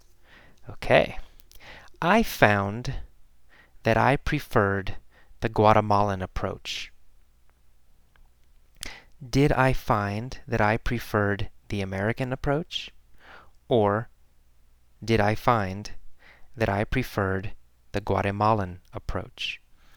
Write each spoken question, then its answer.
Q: Or did I find that I preferred the Guatemalan approach?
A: Well, the Guatemalan approach.